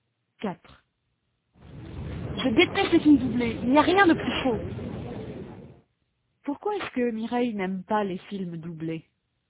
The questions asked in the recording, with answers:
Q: Pourquoi est-ce que Mireille n'aime pas les films doublés ?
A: Parce qu'il n'y a rien de plus faux.